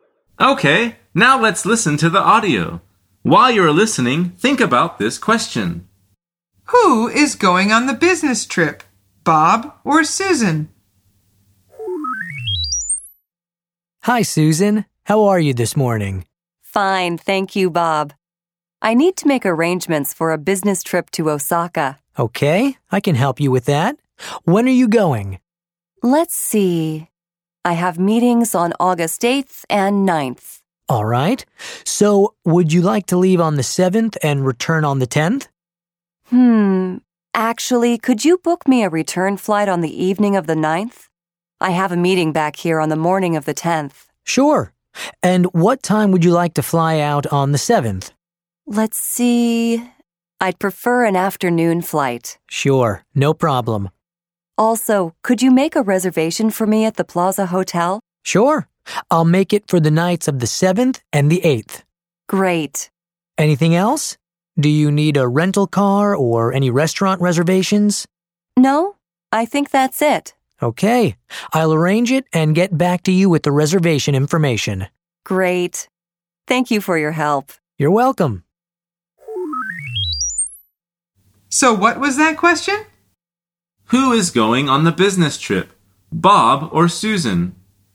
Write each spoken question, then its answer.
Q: Who is going on the business trip, Bob or Susan?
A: The answer is Susan.